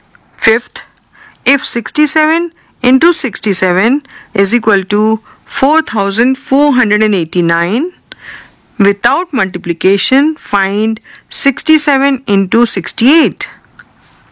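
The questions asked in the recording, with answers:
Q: find 67 into 68.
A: 4556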